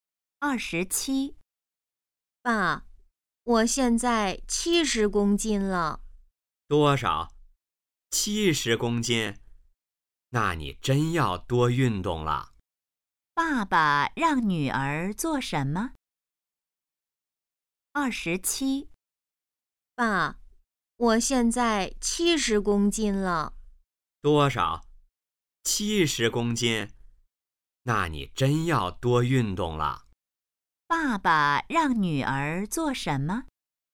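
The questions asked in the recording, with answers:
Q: 爸爸让女儿做什么?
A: 多运动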